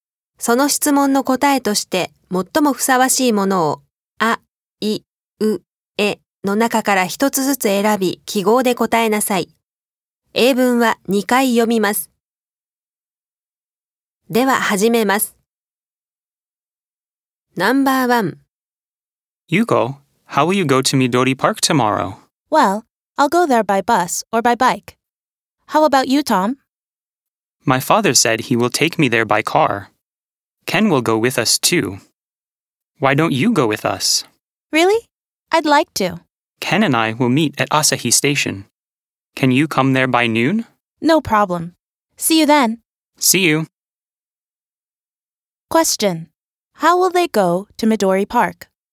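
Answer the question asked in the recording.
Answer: By car (Tom's father will take them).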